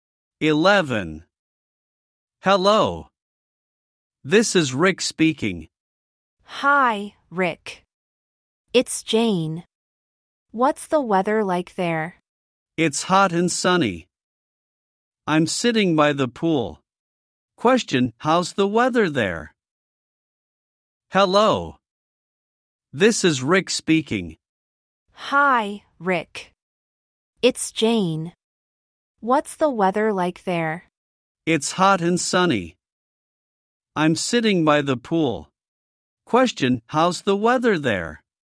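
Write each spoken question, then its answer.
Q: Question, how's the weather there?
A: Hot and sunny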